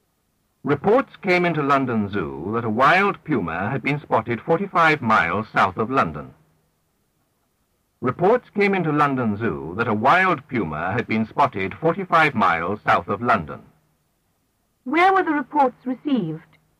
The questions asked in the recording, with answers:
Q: Where were the reports received?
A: At London Zoo.